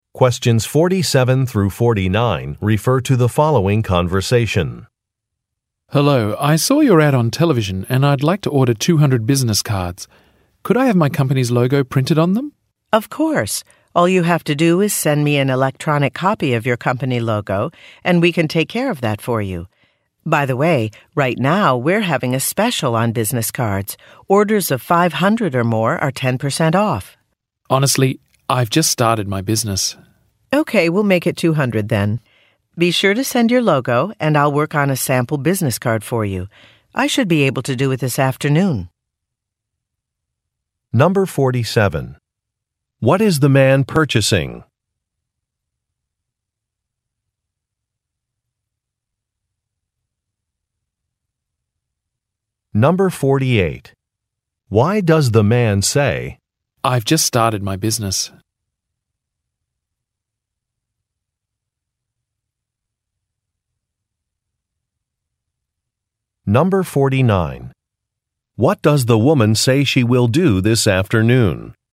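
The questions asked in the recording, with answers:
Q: What is the man purchasing?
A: Business cards (200)

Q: Why does the man say, "I've just started my business"?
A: To decline the larger discounted order, because he doesn't need 500 cards

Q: What does the woman say she will do this afternoon?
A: Make a sample business card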